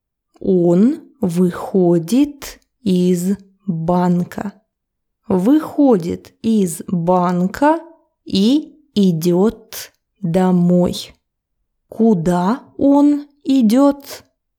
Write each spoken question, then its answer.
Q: Куда он идет?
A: Домой. Он идет домой.